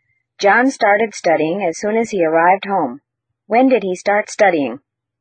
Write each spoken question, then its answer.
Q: When did he start studying?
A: He started studying as soon as he arrived home.